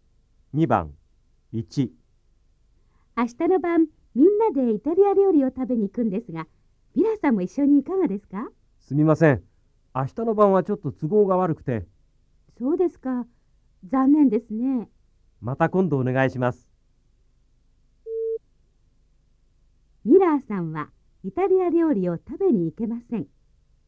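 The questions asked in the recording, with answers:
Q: ミラーさんはイタリア料理を食べに行けません。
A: ○(正しい)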